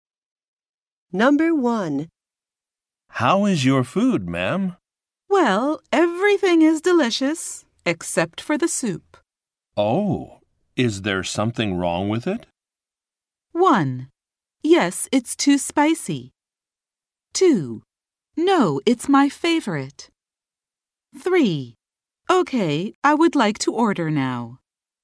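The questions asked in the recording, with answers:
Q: Oh, is there something wrong with it?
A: 1: Yes, it's too spicy.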